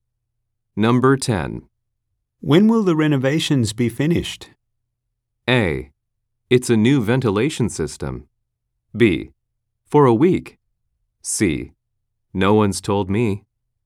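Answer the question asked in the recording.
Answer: C: No one's told me.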